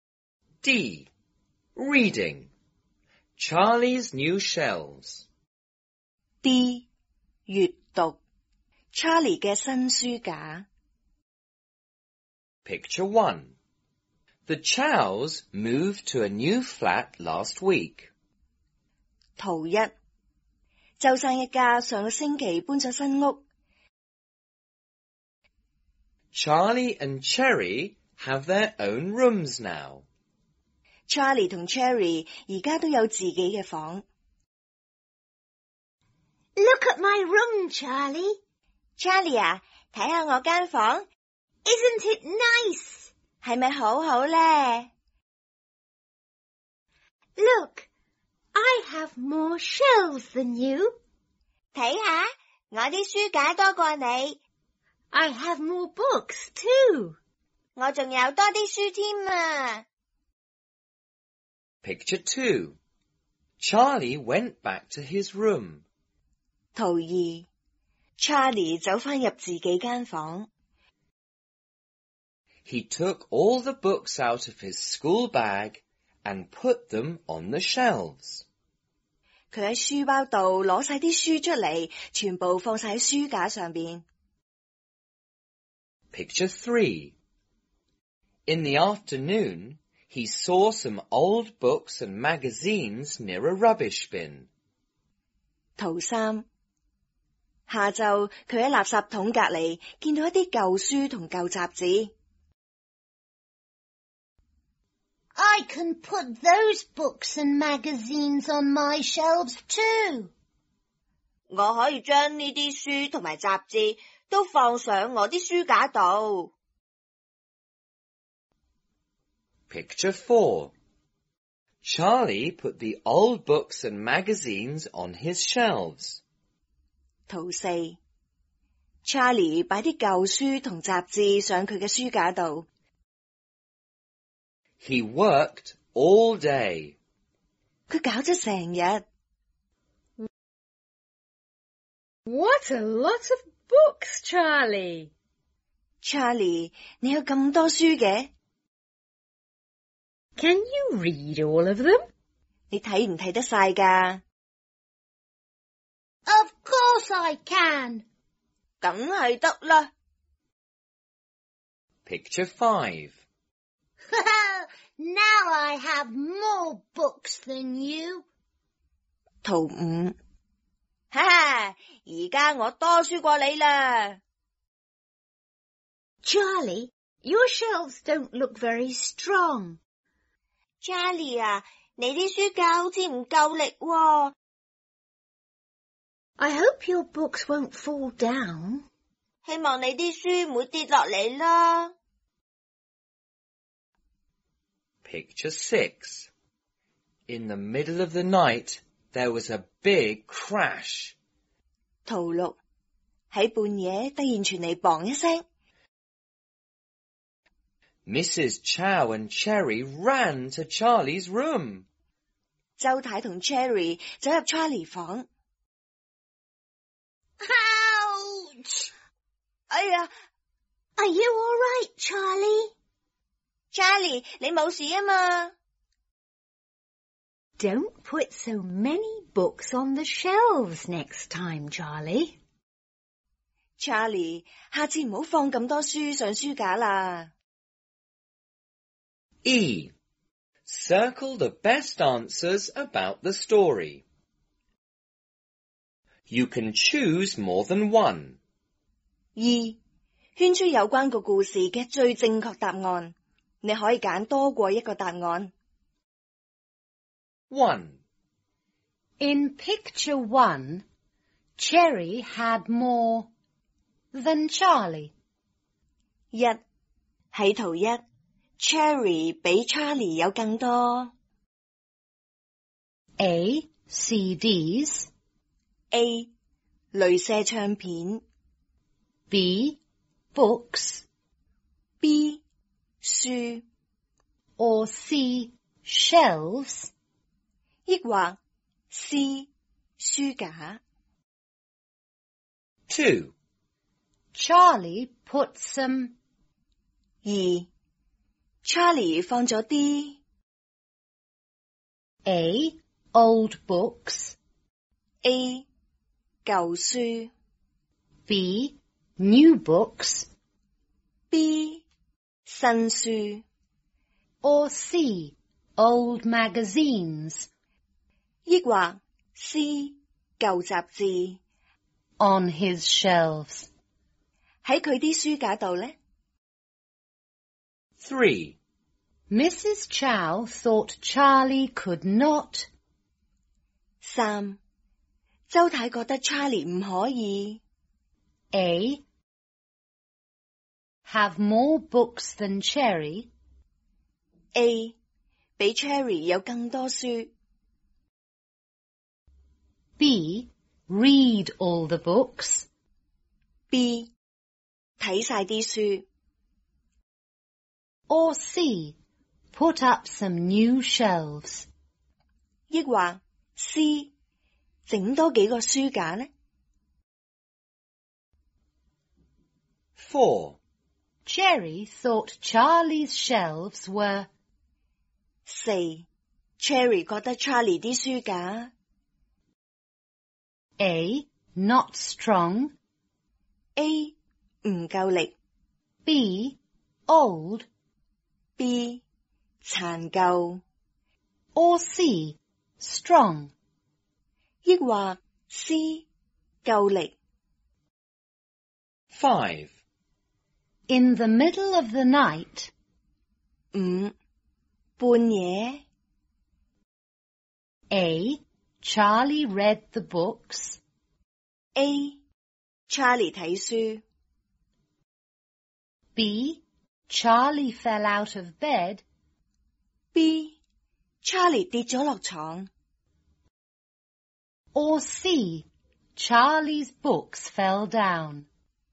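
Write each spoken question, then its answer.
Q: In picture 1, Cherry had more than Charlie.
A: B: books; C: shelves

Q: Charlie put some.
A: A: old books; C: old magazines

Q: Mrs. Chow thought Charlie could not.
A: B: Read all the books.

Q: Cherry thought Charlie's shelves were.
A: A: not strong

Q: In the middle of the night,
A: C: Charlie's books fell down.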